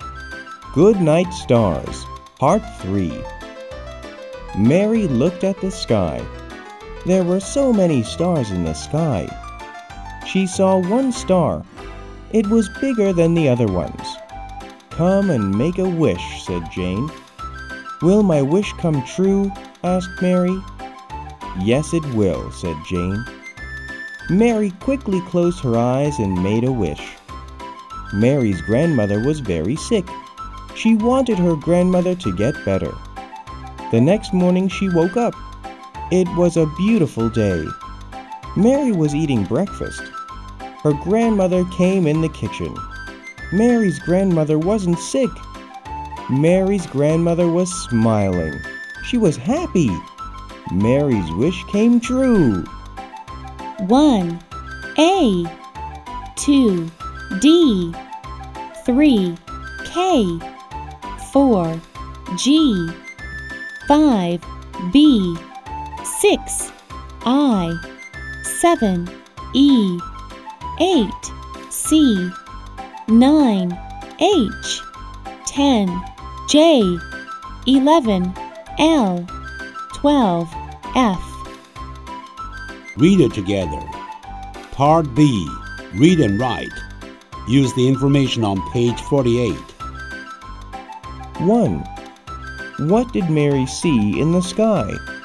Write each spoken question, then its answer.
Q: What did Mary see in the sky?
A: She saw many stars in the sky.